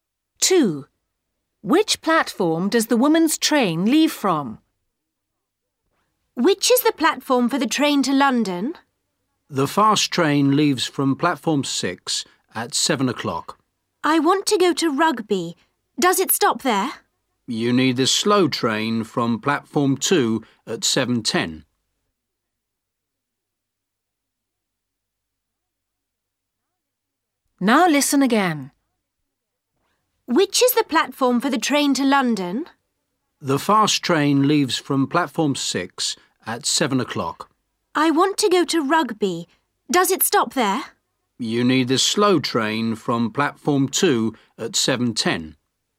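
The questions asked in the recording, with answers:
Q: Which platform does the woman's train leave from?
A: Platform 2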